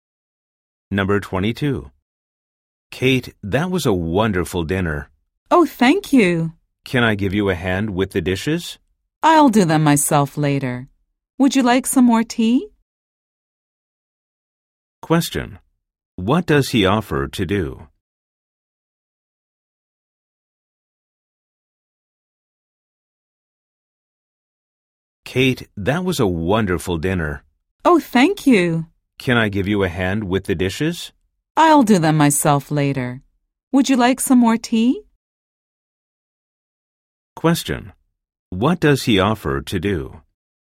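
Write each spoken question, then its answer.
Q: What does he offer to do?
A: Help with the dishes.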